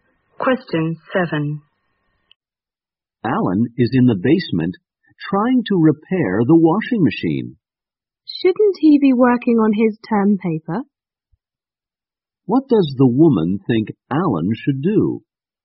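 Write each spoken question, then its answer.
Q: What does the woman think Alan should do?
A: Work on his term paper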